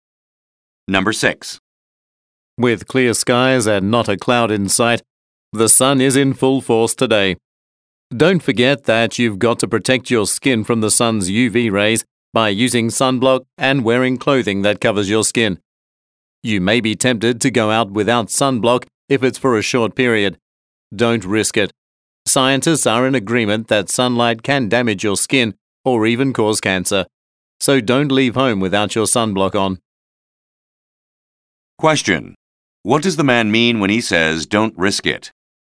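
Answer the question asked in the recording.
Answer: Always wear sunblock, even when going out for a short time.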